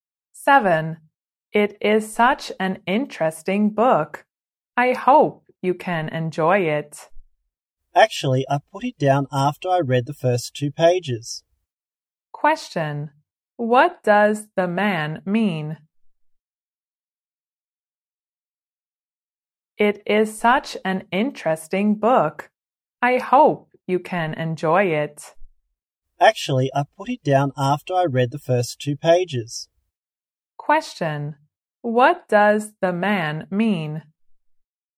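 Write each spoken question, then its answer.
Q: what does the man mean?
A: He doesn't find the book interesting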